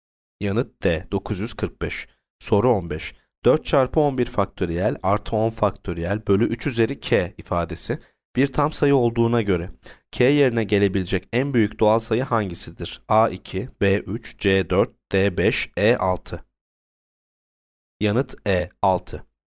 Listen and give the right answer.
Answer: Yanıt E 6.